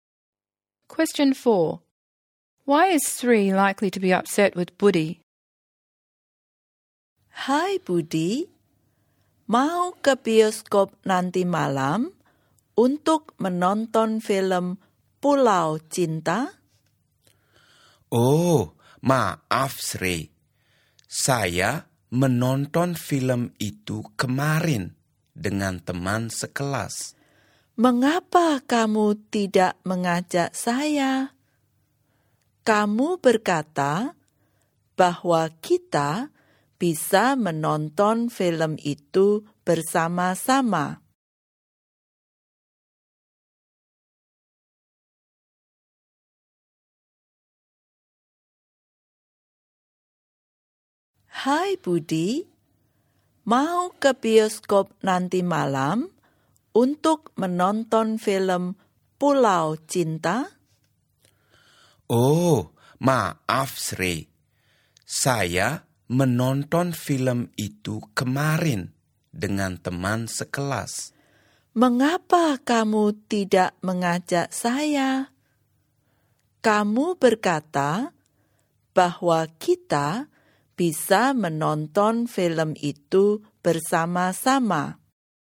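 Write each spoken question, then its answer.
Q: Why is Sri likely to be upset with Budi?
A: Budi saw the film Pulau Cinta yesterday with a classmate, though he had said they could watch it together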